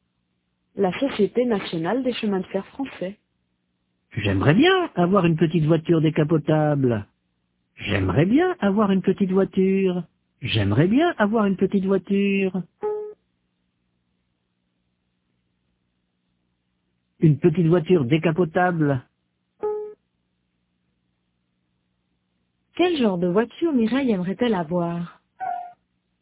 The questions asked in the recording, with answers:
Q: Quel genre de voiture Mireille aimerait-elle avoir?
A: Une petite voiture décapotable.